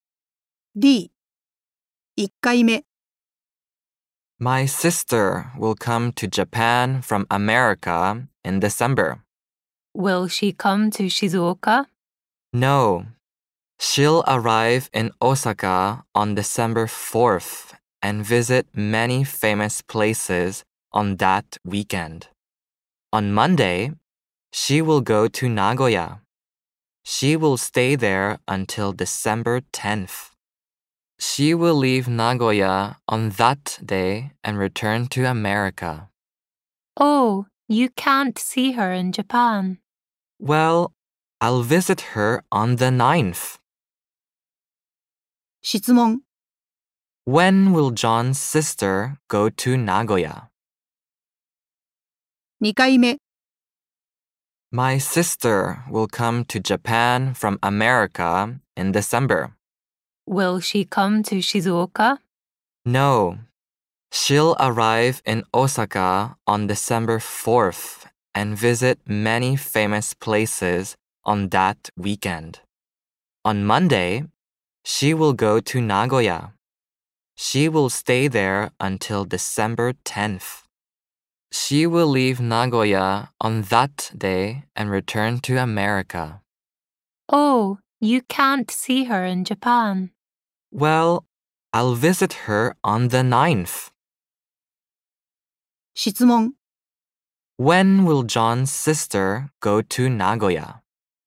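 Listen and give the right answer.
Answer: On Monday.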